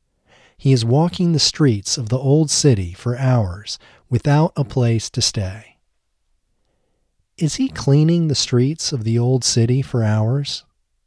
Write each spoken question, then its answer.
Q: Is he cleaning the streets of the old city for hours?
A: No, he isn't cleaning the streets of the old city for hours.